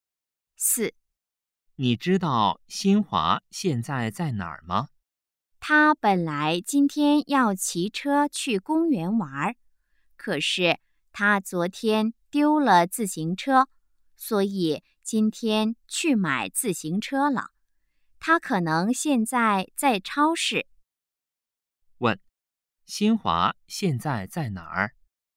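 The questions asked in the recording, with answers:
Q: 问,新华现在在哪儿?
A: 超市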